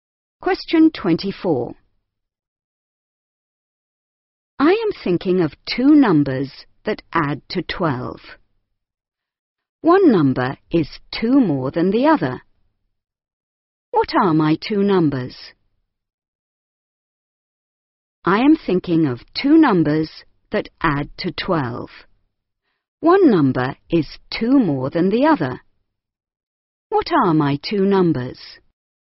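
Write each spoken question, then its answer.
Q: What are my 2 numbers?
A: 5 and 7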